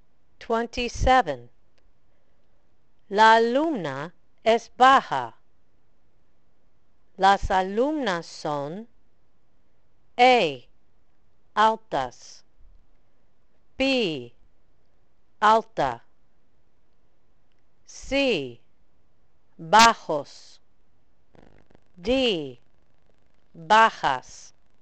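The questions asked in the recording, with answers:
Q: La alumna es baja. Las alumnas son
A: D: bajas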